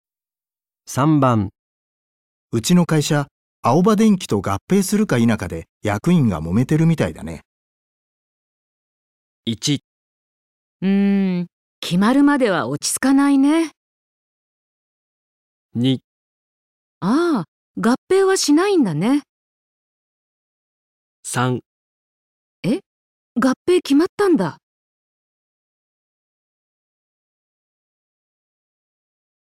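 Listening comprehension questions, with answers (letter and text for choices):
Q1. うちの会社、アオバ電機と合併するか否かで役員が揉めてるみたいだね。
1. うーん、決まるまでは落ち着かないね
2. ああ、合併はしないんだね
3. え、合併決まったんだ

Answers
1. 1. うーん、決まるまでは落ち着かないね

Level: N1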